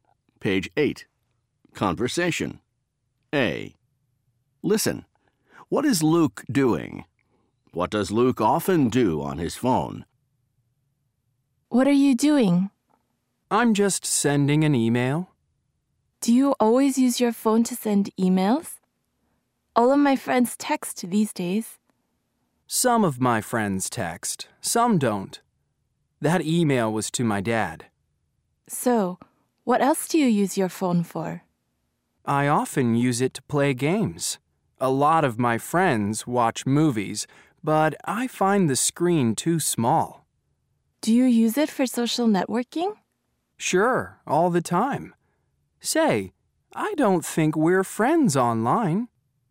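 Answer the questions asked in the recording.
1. Sending an email
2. Plays games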